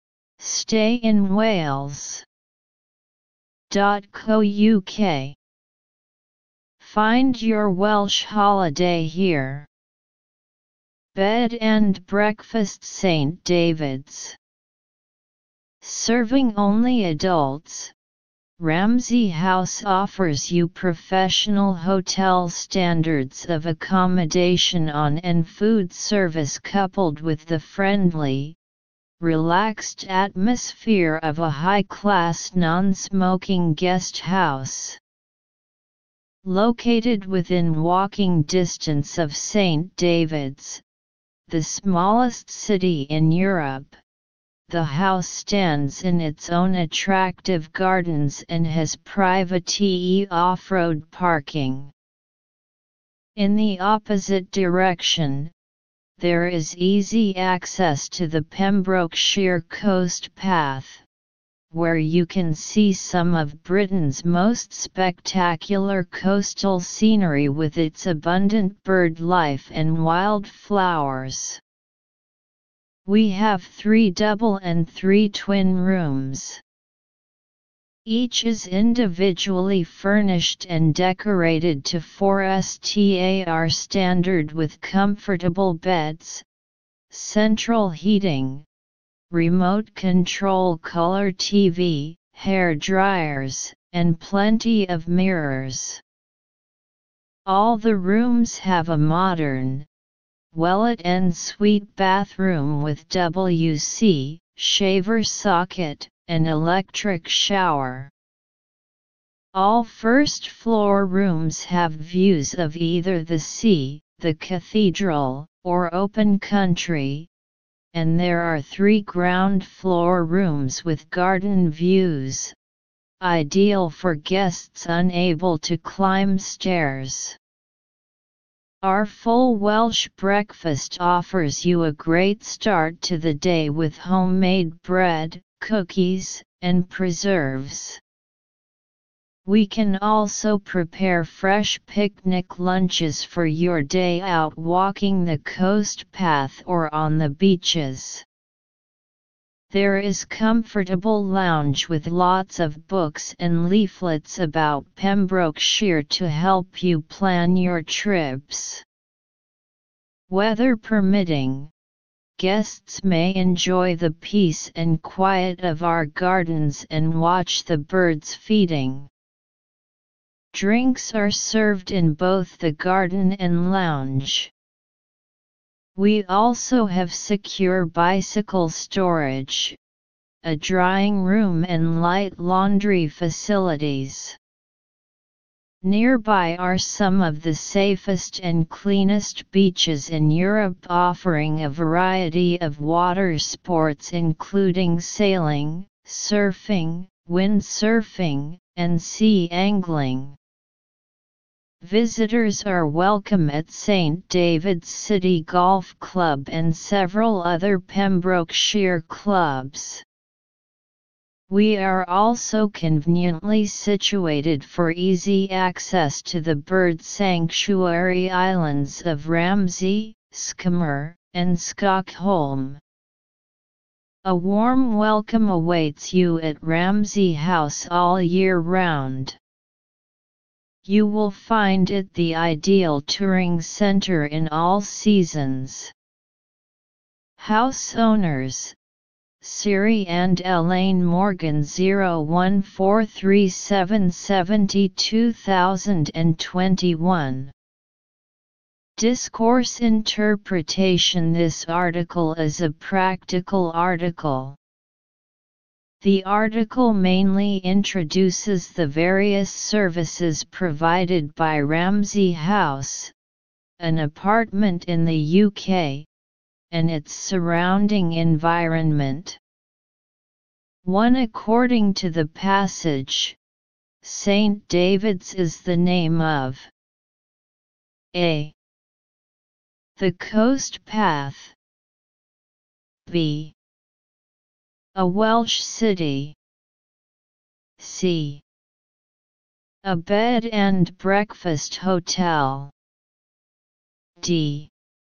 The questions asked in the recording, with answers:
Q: According to the passage, St. David's is the name of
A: So choose B. Answer B.